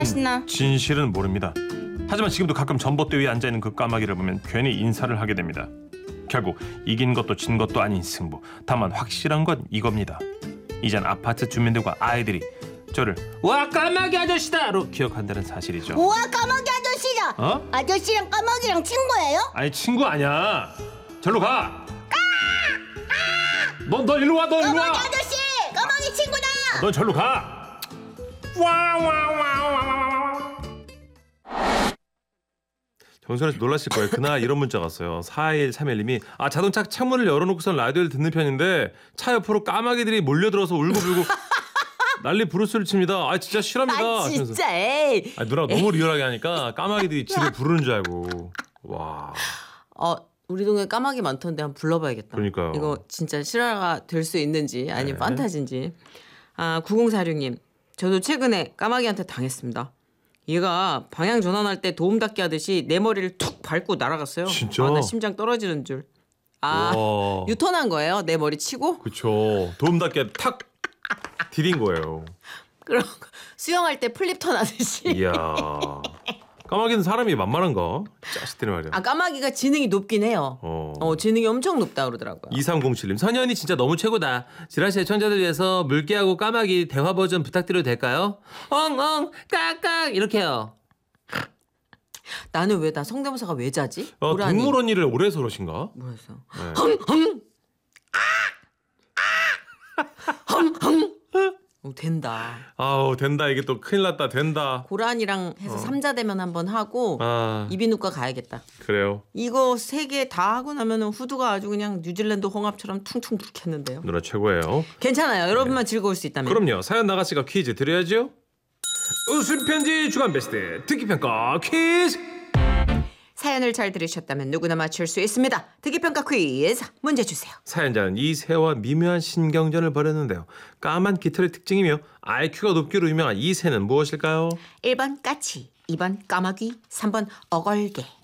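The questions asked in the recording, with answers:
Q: 까만 깃털의 특징이며 IQ가 높기로 유명한 이 새는 무엇일까요?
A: 2번: 까마귀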